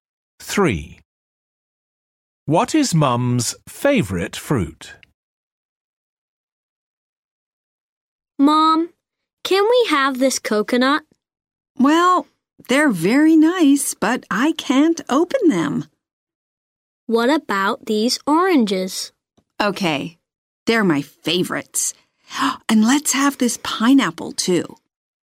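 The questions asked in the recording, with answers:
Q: What is Mum's favourite fruit?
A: Oranges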